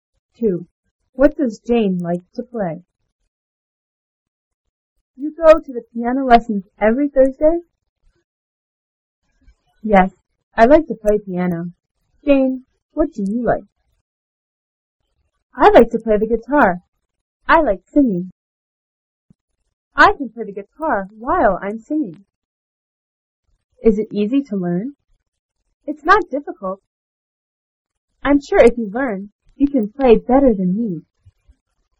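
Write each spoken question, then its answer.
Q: What does Jane like to play?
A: The guitar.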